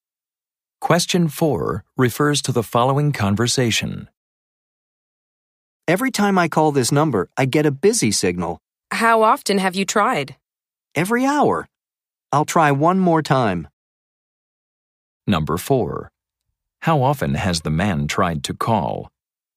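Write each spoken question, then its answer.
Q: How often has the man tried to call?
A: Every hour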